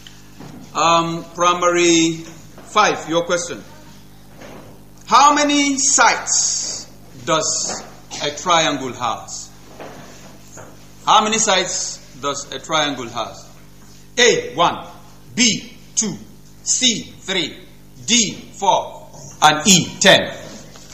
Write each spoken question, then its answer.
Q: How many sides does a triangle have?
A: C, 3. Bravo.